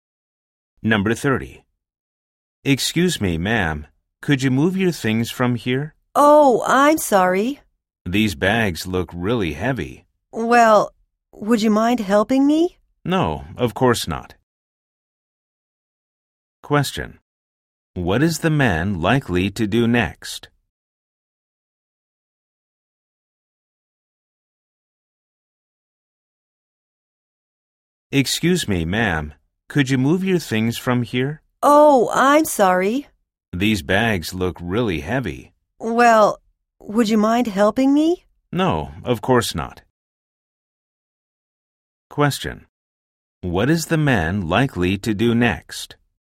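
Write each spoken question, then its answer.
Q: What is the man likely to do next?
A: Help the woman carry her bags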